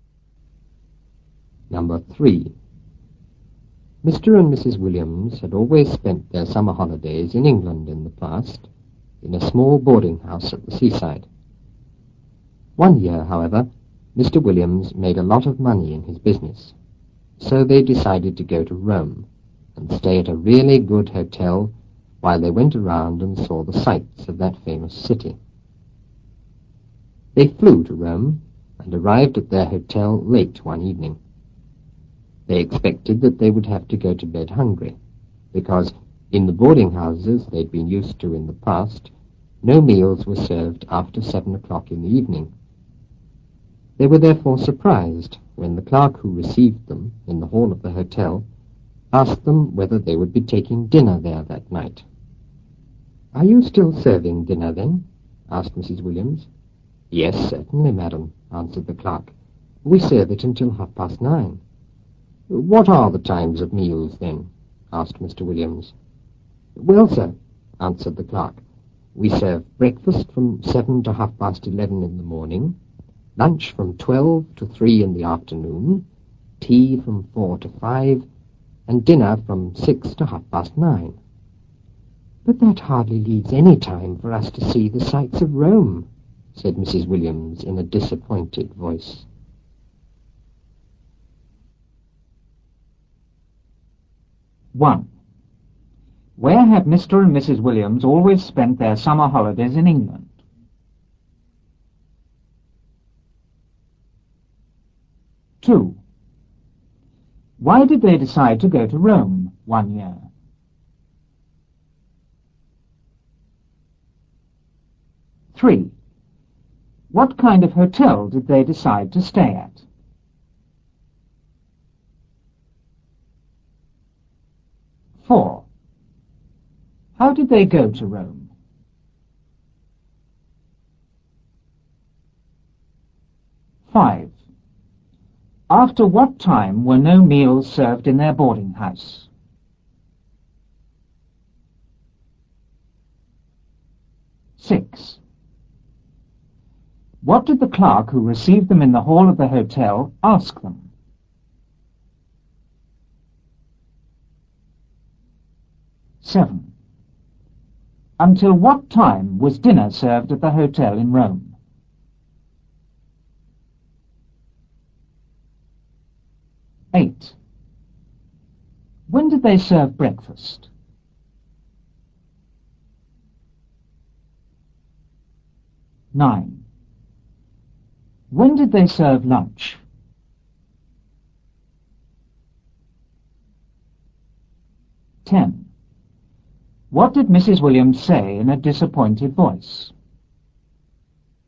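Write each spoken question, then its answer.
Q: Where have Mr. and Mrs. Williams always spent their summer holidays in England?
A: In a small boarding house at the seaside

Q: Why did they decide to go to Rome one year?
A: Mr. Williams made a lot of money in his business

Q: What kind of hotel did they decide to stay at?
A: A really good hotel

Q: How did they go to Rome?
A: They flew

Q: After what time were no meals served in their boarding house?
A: After 7 o'clock in the evening

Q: What did the clerk who received them in the hall of the hotel ask them?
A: Whether they would be taking dinner there that night

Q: Until what time was dinner served at the hotel in Rome?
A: Until 9:30

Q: When did they serve breakfast?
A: From 7 to 11:30 in the morning

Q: When did they serve lunch?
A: From 12 to 3 in the afternoon

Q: What did Mrs. Williams say in a disappointed voice?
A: But that hardly leaves any time for us to see the sights of Rome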